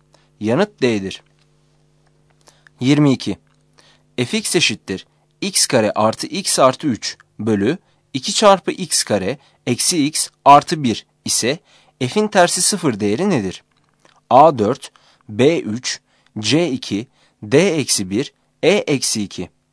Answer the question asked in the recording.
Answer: Yanıt A'dır.